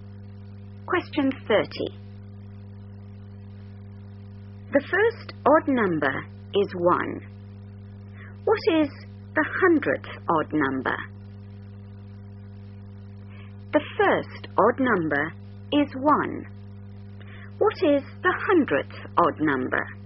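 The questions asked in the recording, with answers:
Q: What is the hundredth odd number?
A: 199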